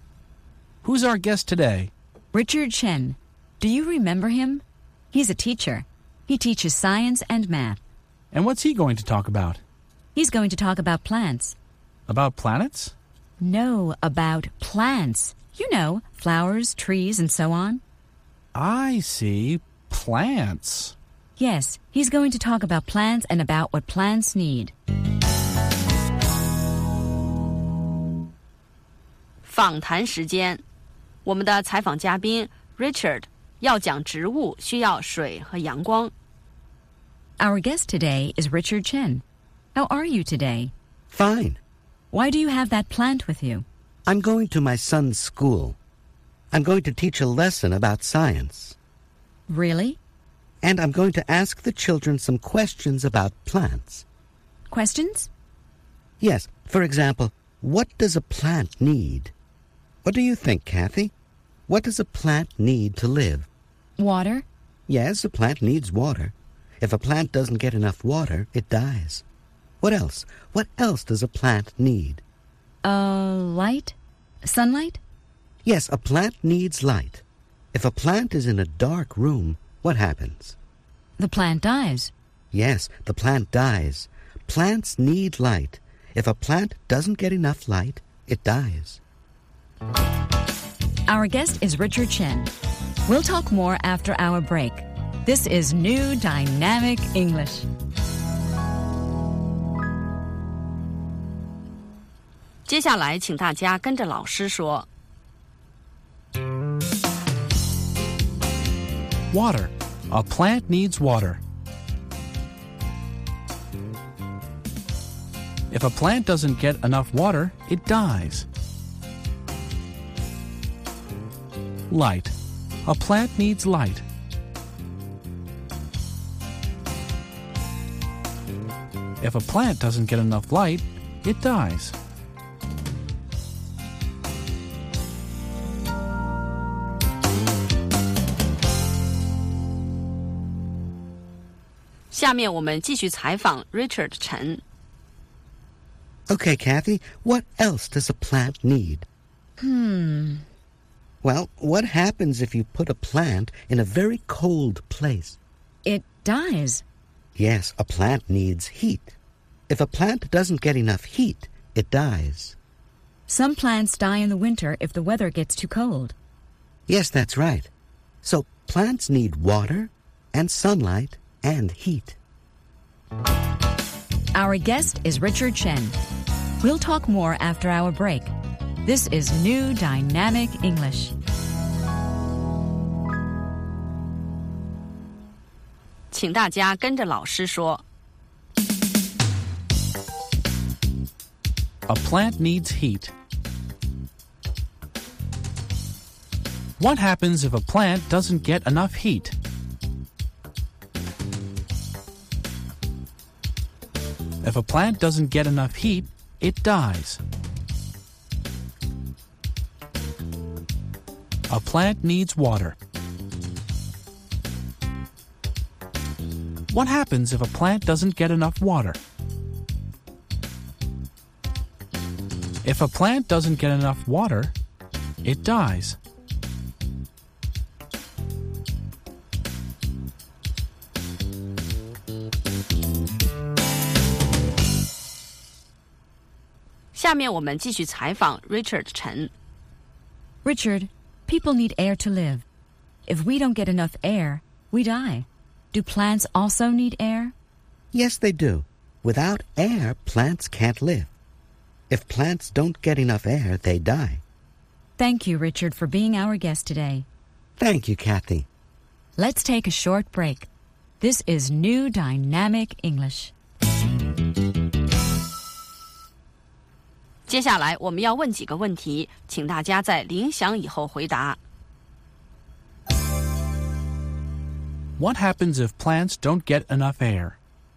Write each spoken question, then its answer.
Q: What happens if plants don't get enough air?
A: They die. If plants don't get enough air, they die.